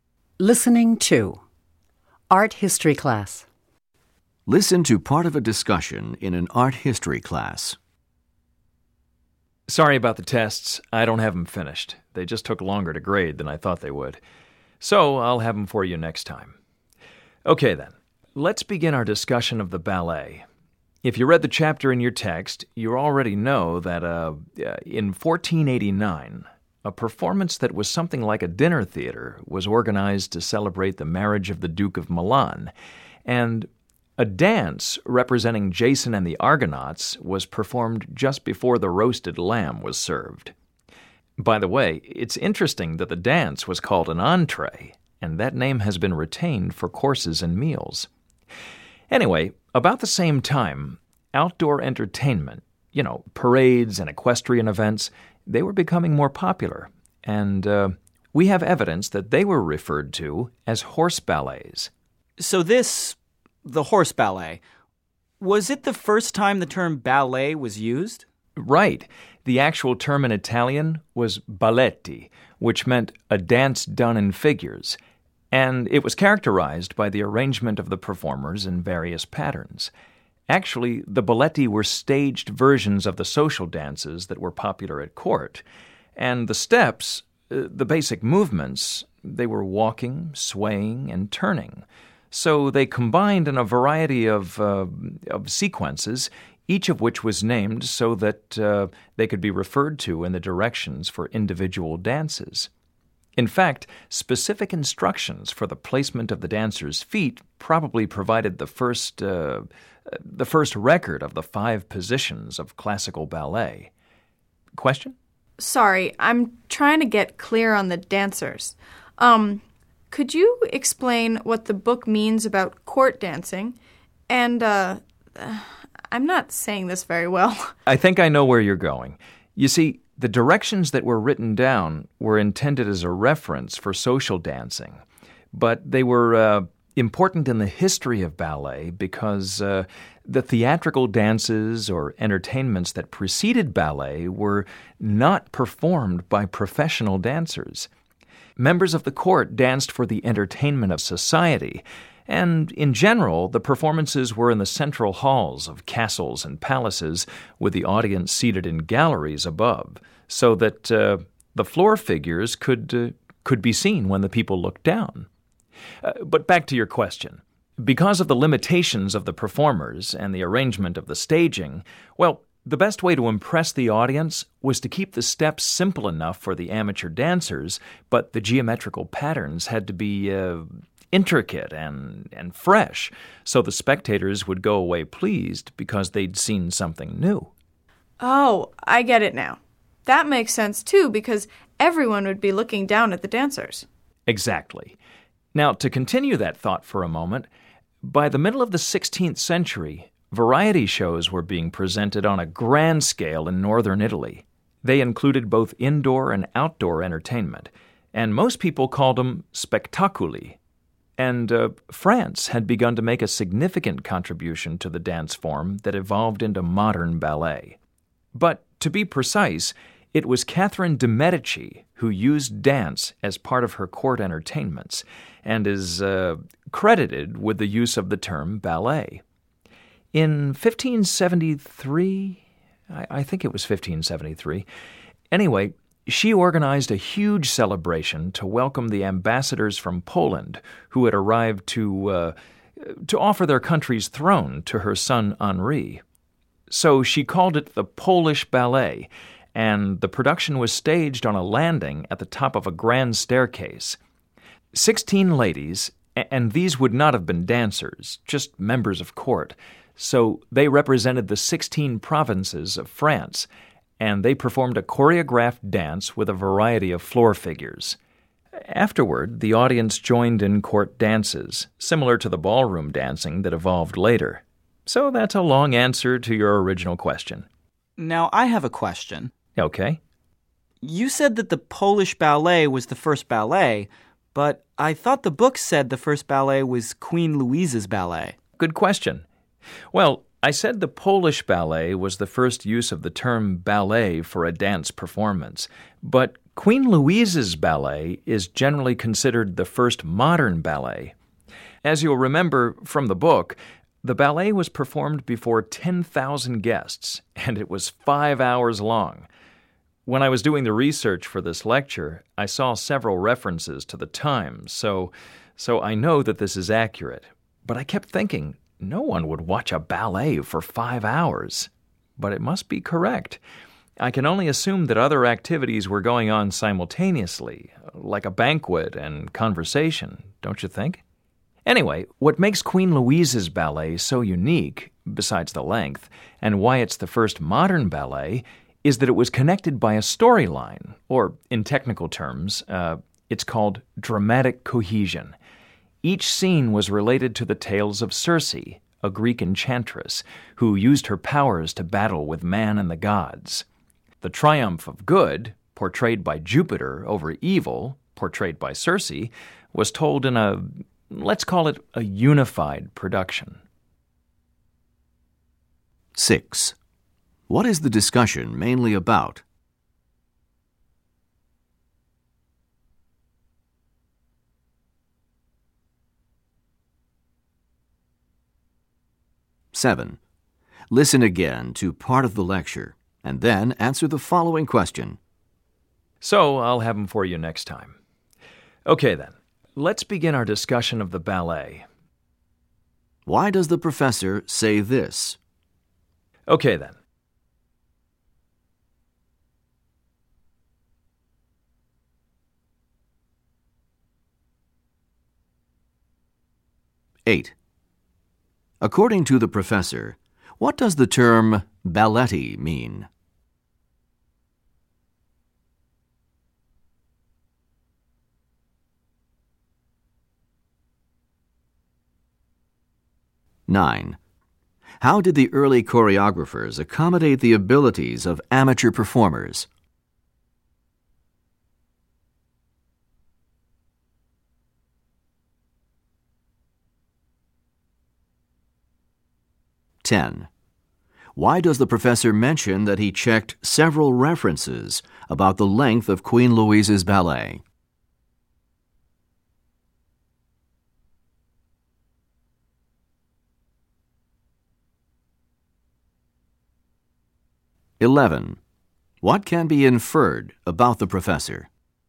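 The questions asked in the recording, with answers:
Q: What is the discussion mainly about?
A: The early history of ballet

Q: According to the professor, what does the term balletti mean?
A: A dance done in figures

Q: How did the early choreographers accommodate the abilities of amateur performers?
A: They kept the steps simple but made the floor patterns intricate

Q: Why does the professor mention that he checked several references about the length of Queen Louise's ballet?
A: To show that the five-hour length, though surprising, is accurate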